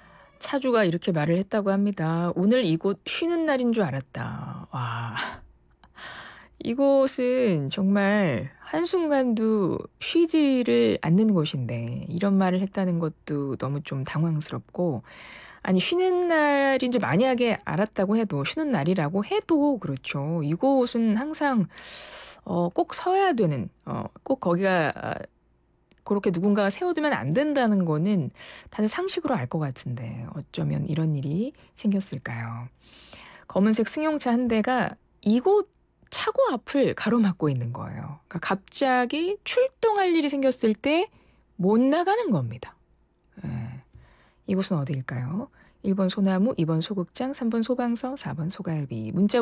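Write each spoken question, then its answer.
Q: 이곳은 어디일까요? 1번 소나무, 2번 소극장, 3번 소방서, 4번 소갈비.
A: 3번: 소방서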